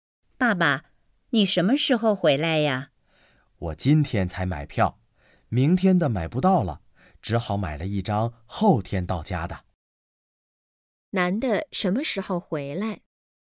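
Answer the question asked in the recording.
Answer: 后天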